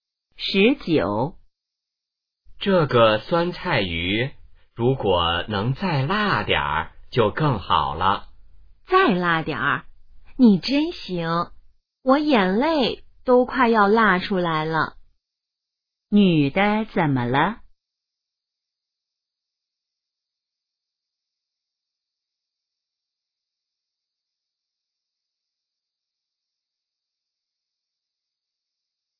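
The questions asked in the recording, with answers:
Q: 女的怎么了?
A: 辣得快流眼泪了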